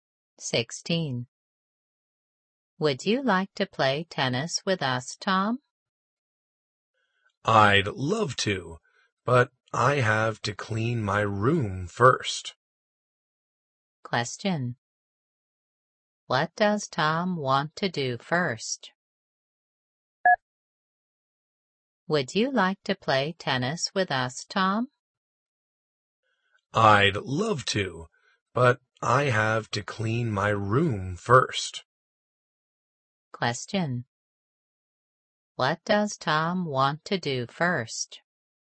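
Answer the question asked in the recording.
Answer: Clean his room.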